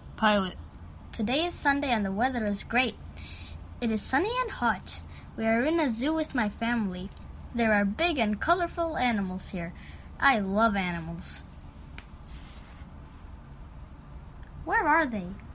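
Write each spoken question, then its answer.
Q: Where are they?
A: In a zoo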